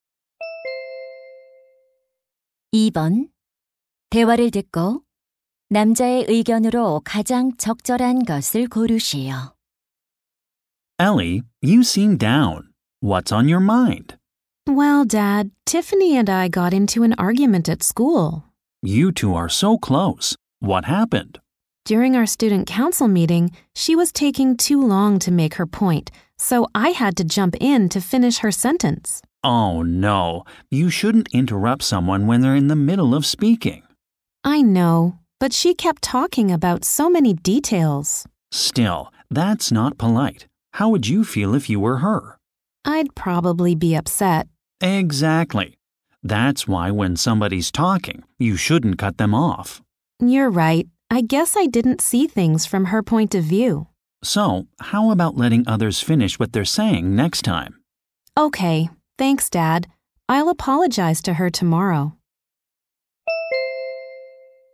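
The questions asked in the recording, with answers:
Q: 대화를 듣고 남자의 의견으로 가장 적절한 것을 고르시오.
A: 다른 사람이 말할 때 말을 끊지 말아야 한다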